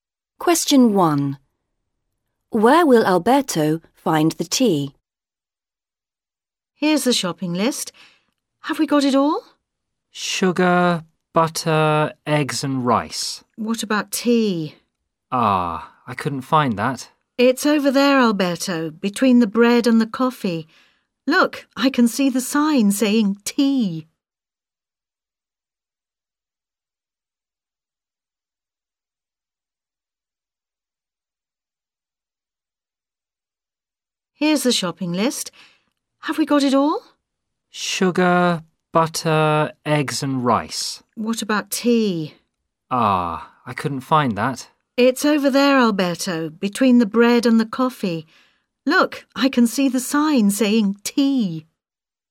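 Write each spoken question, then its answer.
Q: Where will Alberto find the tea?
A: Between the bread and the coffee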